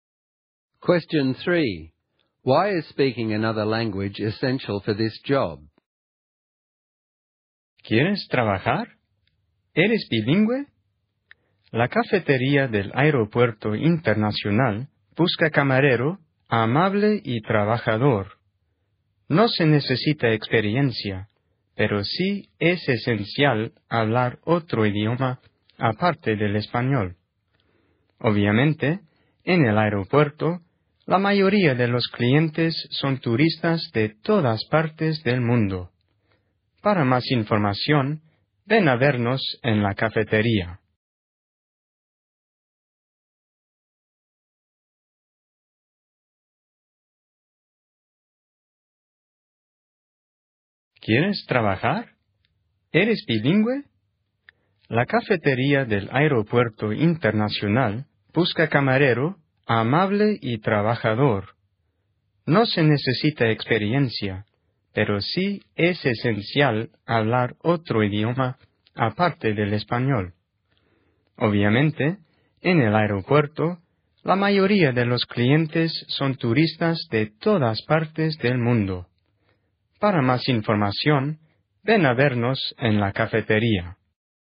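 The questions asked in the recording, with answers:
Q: Why is speaking another language essential for this job?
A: At the airport café most customers are tourists from all over the world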